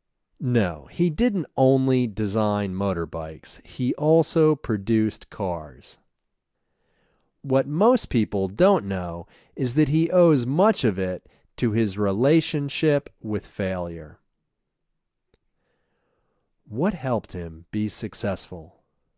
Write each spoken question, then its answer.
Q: What helped him be successful?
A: His relationship with failure helped him be successful.